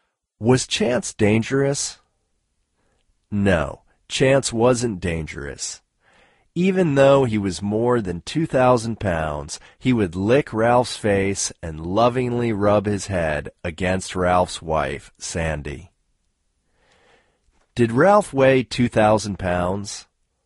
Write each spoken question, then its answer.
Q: Did Ralph weigh 2,000 pounds?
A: No, Ralph didn't weigh 2,000 pounds.